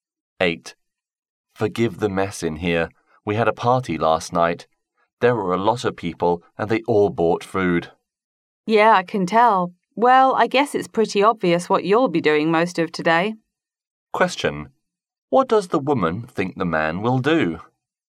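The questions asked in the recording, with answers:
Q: What does the woman think the man will do?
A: Clean up the mess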